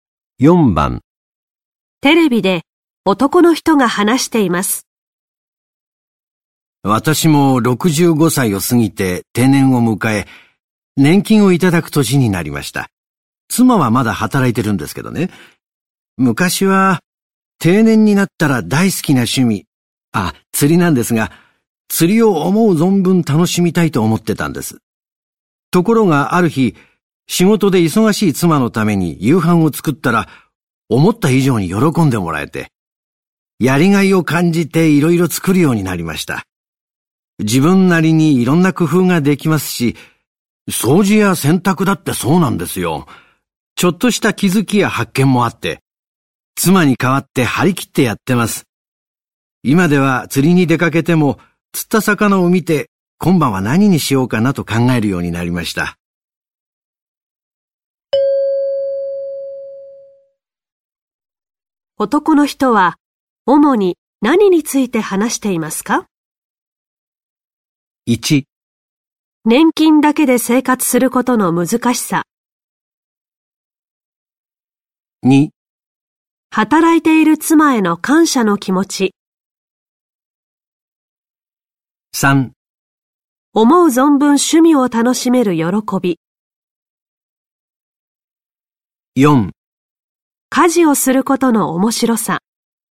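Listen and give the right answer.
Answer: 4: 家事をすることの面白さ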